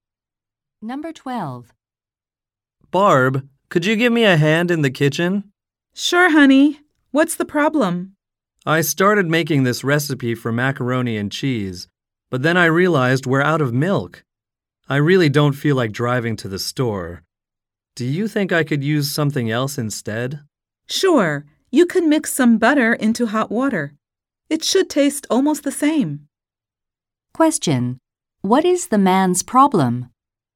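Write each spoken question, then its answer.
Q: What is the man's problem?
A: They are out of milk for his recipe.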